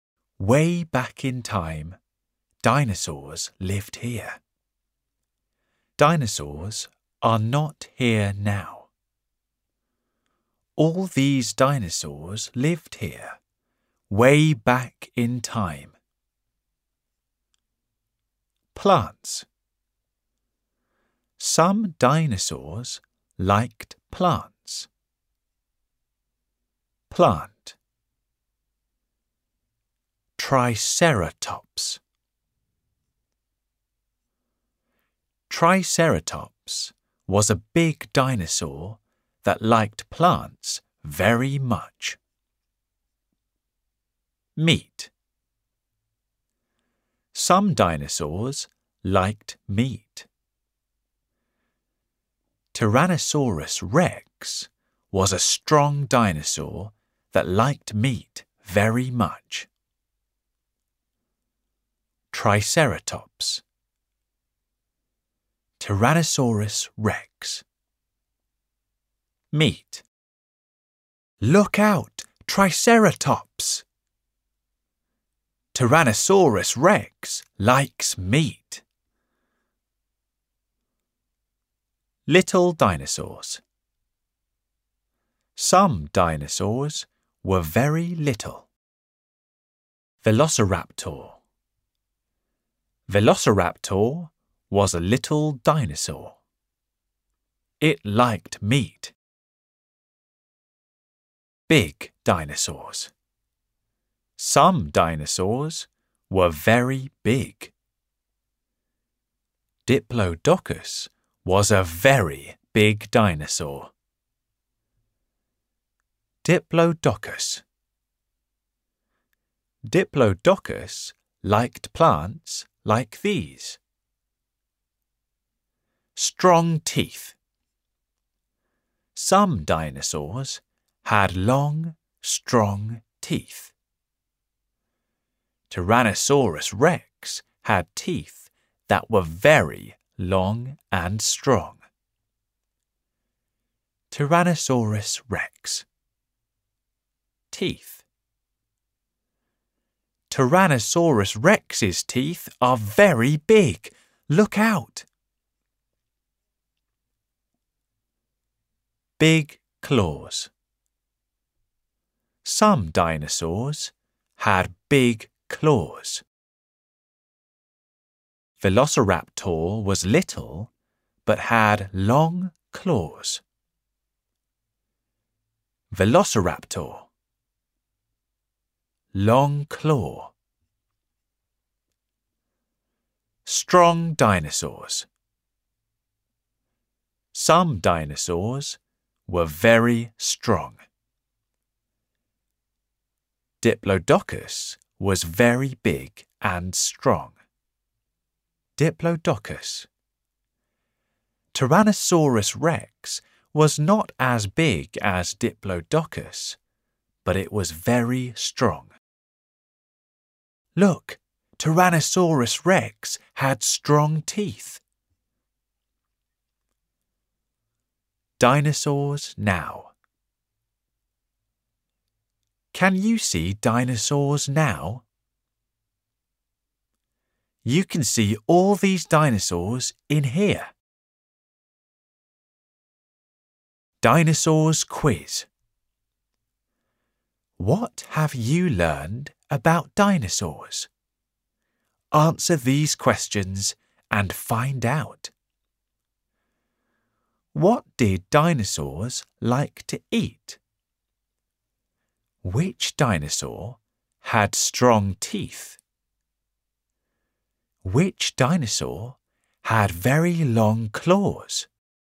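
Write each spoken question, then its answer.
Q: What did dinosaurs like to eat?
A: Plants or meat

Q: Which dinosaur had strong teeth?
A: Tyrannosaurus rex

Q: Which dinosaur had very long claws?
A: Velociraptor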